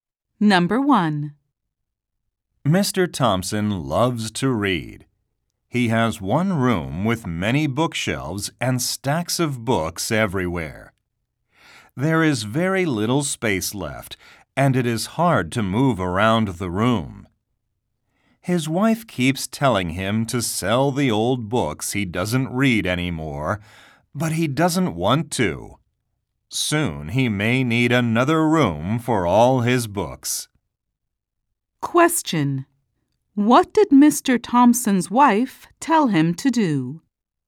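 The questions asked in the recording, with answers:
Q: What did Mr. Thompson's wife tell him to do?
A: Sell the old books he doesn't read anymore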